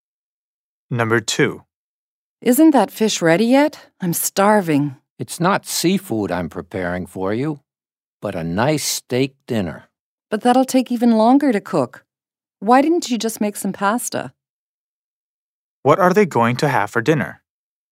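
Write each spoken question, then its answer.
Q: What are they going to have for dinner?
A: Steak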